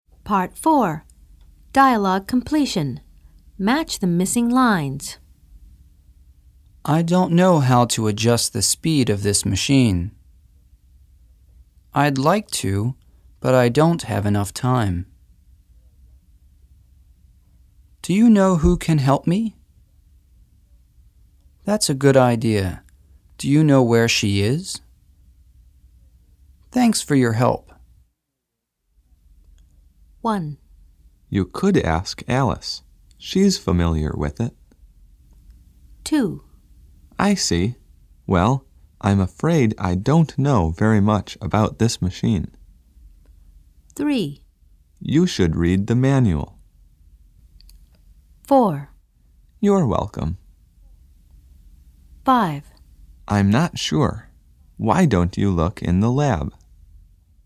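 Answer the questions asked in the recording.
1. Do you know who can help me?
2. I'd like to, but I don't have enough time.
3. I don't know how to adjust the speed of this machine.
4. Thanks for your help.
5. That's a good idea. Do you know where she is?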